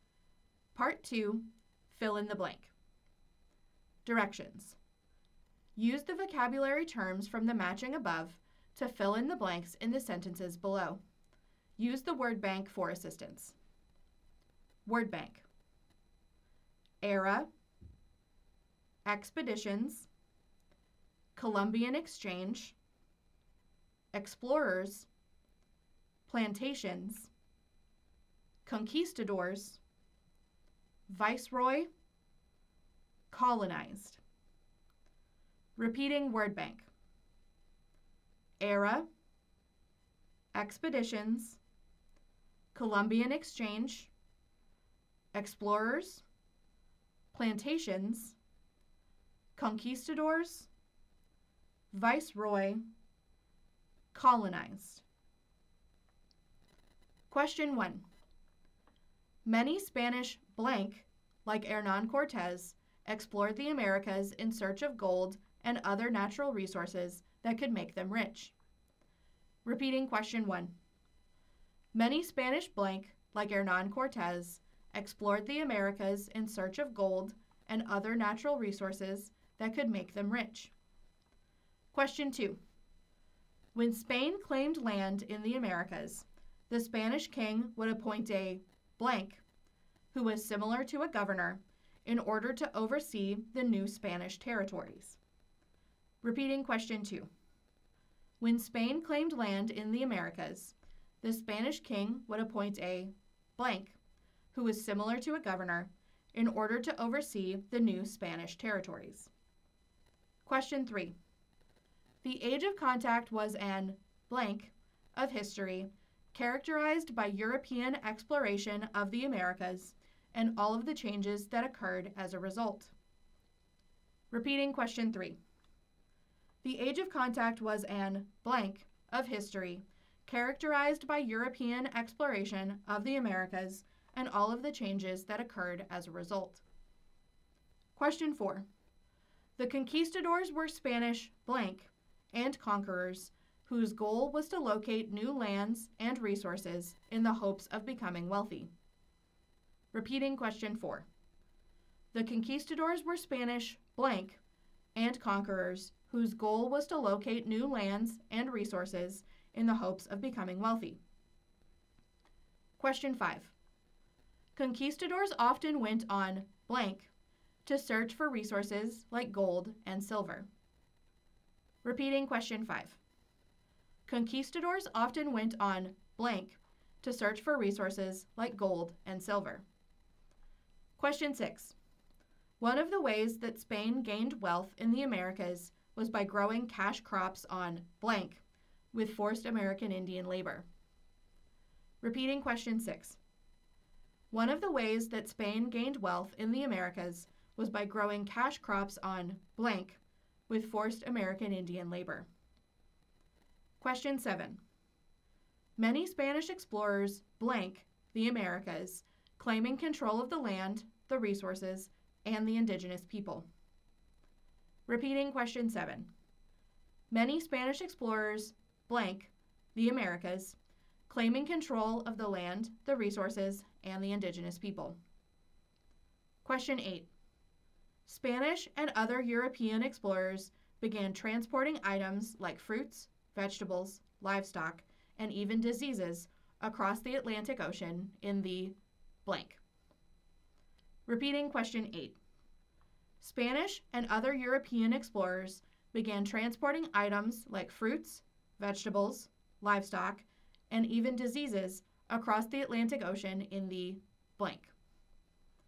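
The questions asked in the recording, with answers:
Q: Many Spanish blank, like Hernan Cortes, explored the Americas in search of gold and other natural resources that could make them rich.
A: conquistadors

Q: When Spain claimed land in the Americas, the Spanish king would appoint a blank, who was similar to a governor, in order to oversee the new Spanish territories.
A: viceroy

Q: The Age of Contact was an blank of history characterized by European exploration of the Americas and all of the changes that occurred as a result.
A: era

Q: The conquistadors were Spanish blank and conquerors whose goal was to locate new lands and resources in the hopes of becoming wealthy.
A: explorers

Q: Conquistadors often went on blank to search for resources like gold and silver.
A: expeditions

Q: One of the ways that Spain gained wealth in the Americas was by growing cash crops on blank with forced American Indian labor.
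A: plantations

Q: Many Spanish explorers blank the Americas, claiming control of the land, the resources, and the indigenous people.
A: colonized

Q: Spanish and other European explorers began transporting items like fruits, vegetables, livestock, and even diseases across the Atlantic Ocean in the blank.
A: Columbian Exchange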